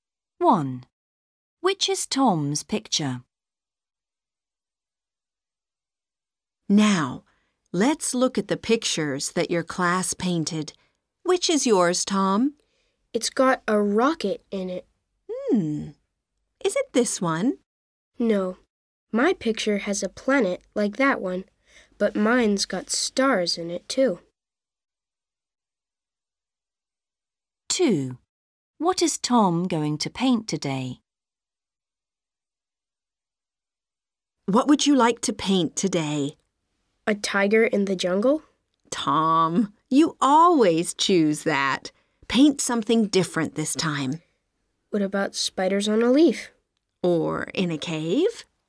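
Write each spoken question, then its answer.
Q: Which is Tom's picture?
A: The one with a rocket, a planet and stars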